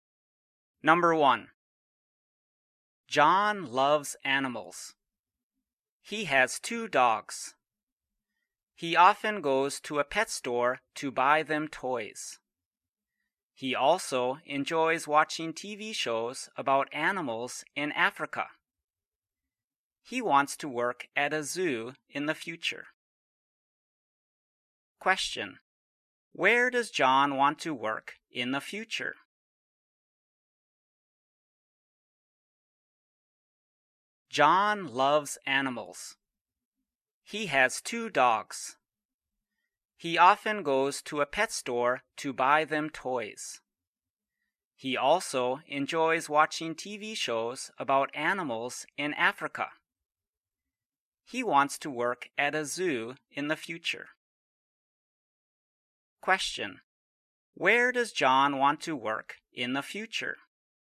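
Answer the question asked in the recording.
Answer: At a zoo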